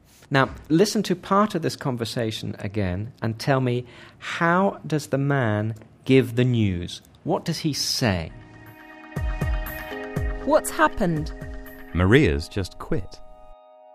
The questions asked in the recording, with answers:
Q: how does the man give the news?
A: Maria's just quit. Maria has just quit.